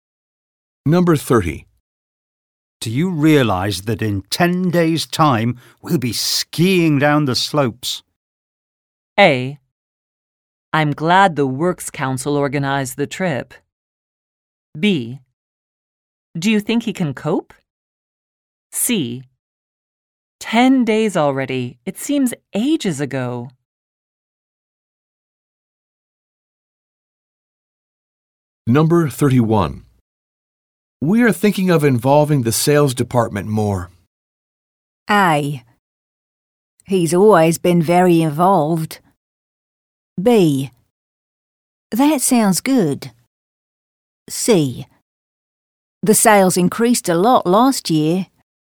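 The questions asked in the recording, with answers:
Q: We are thinking of involving the sales department more.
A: B: That sounds good.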